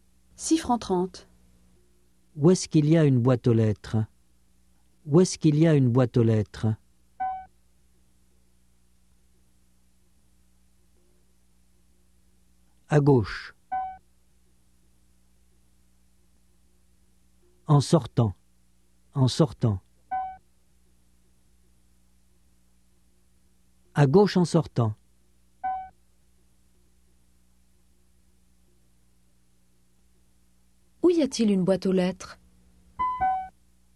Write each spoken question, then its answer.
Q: Où y a-t-il une boîte aux lettres?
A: À gauche en sortant.